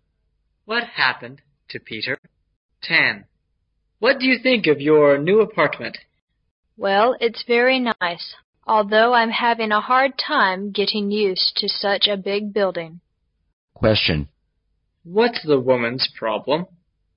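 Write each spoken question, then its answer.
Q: What's the woman's problem?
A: She is having a hard time getting used to such a big building.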